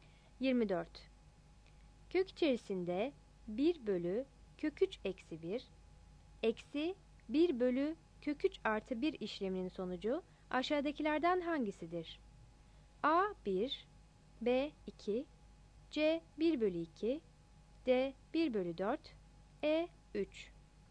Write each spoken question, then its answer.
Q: Kök içerisinde 1 bölü kök 3 eksi 1, eksi 1 bölü kök 3 artı 1 işleminin sonucu aşağıdakilerden hangisidir?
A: 24 A